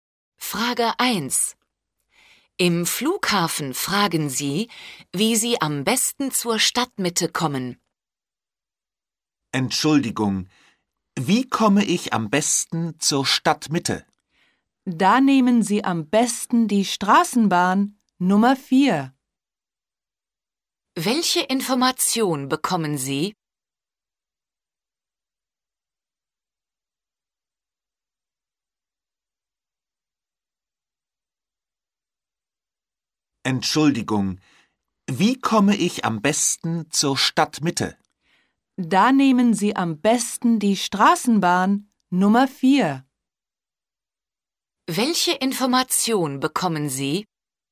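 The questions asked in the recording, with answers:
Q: Welche Information bekommen Sie?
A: Straßenbahn Nummer 4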